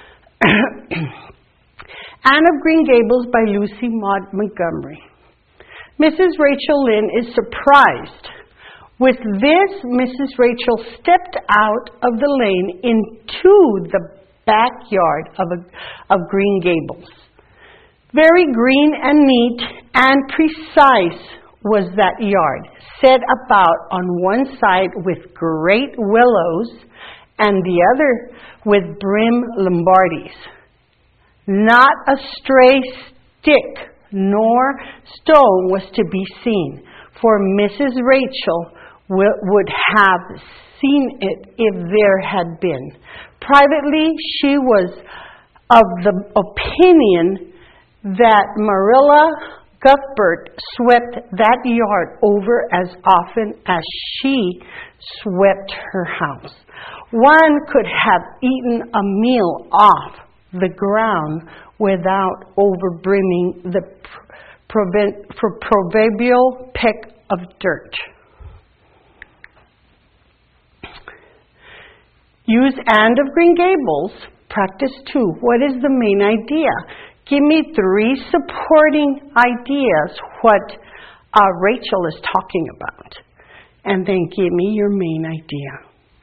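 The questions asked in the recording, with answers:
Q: What is the main idea?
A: The Green Gables yard is very neat and clean.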